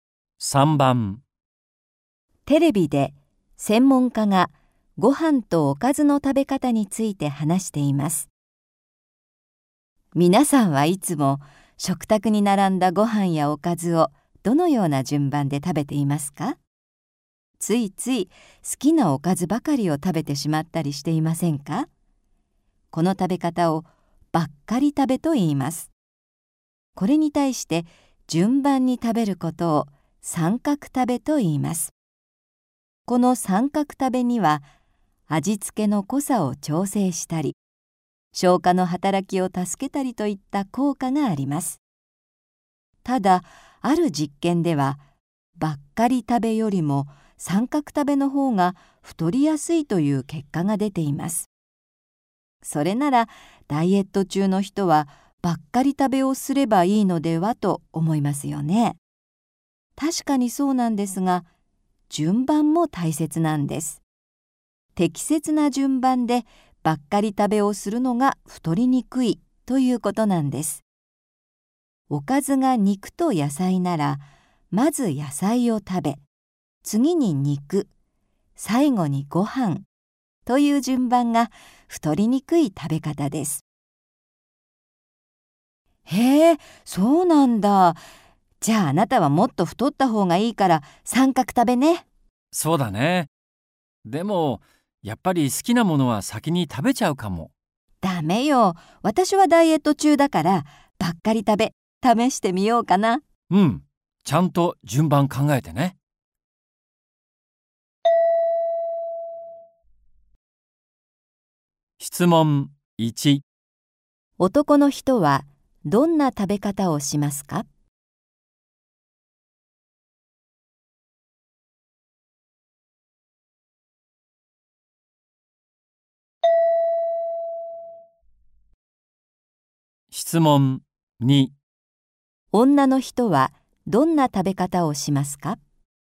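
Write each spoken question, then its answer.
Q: 女の人はどんな食べ方をしますか?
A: 野菜、肉、ご飯の順番でばっかり食べ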